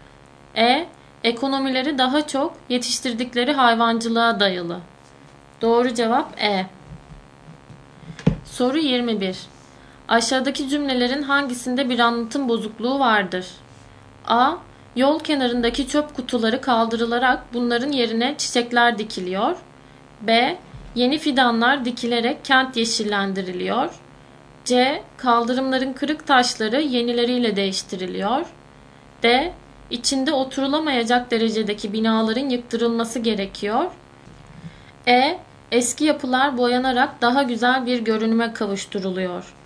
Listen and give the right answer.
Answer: Doğru cevap D.